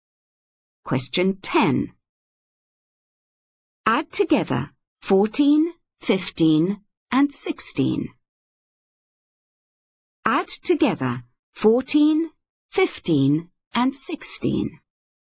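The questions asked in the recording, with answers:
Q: Add together 14, 15, and 16.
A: 45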